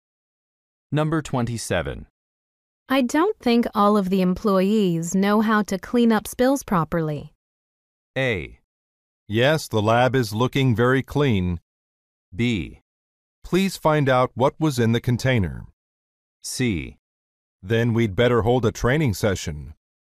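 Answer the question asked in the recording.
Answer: C: Then we'd better hold a training session.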